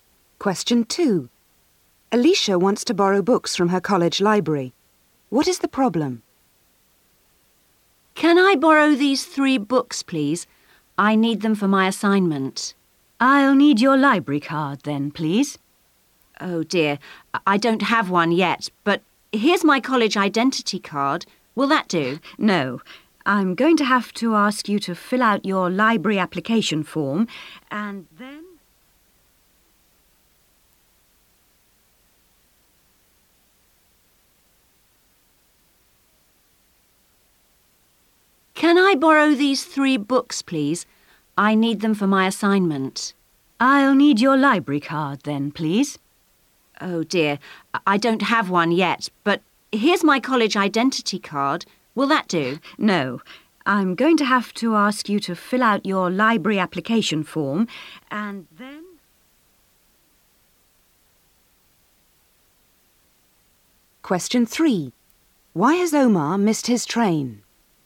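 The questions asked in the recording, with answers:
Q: What is the problem?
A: She doesn't have a library card yet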